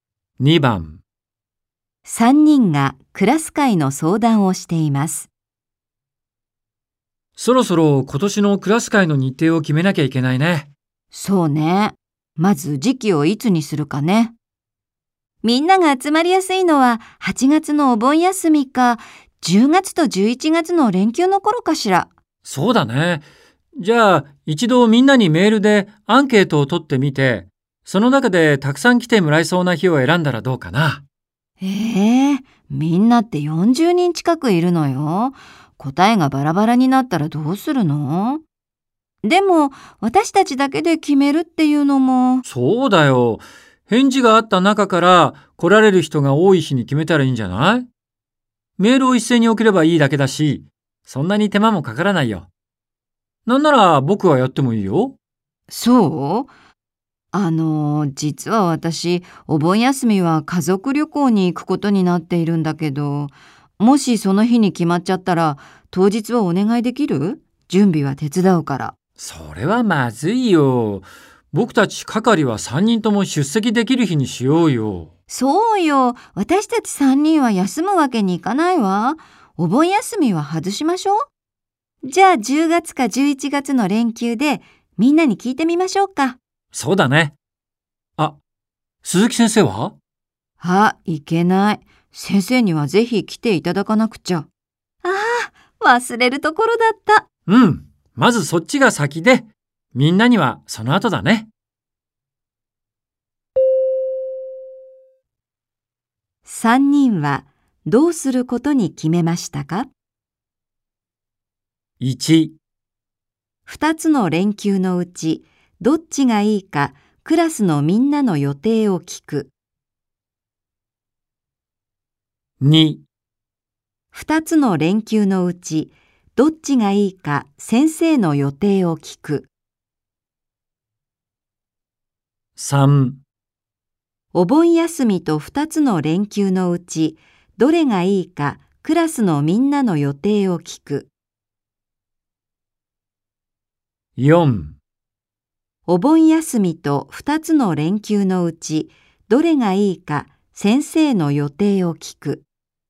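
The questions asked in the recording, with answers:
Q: 3人はどうすることに決めましたか?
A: 2: 2つの連休のうちどっちがいいか先生の予定を聞く。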